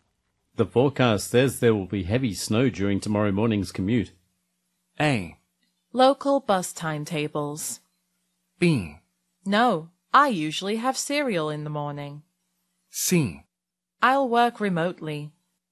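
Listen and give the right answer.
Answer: C: I'll work remotely.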